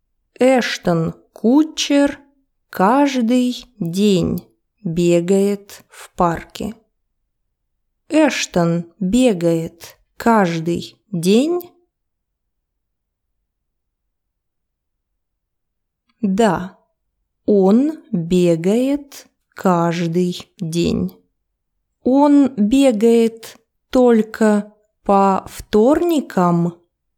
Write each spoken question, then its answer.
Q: Он бегает только по вторникам?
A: Нет, он бегает каждый день.